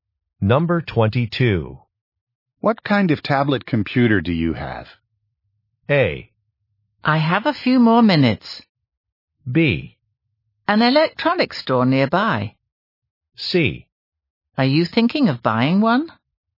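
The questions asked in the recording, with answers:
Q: What kind of tablet computer do you have?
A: C: Are you thinking of buying one?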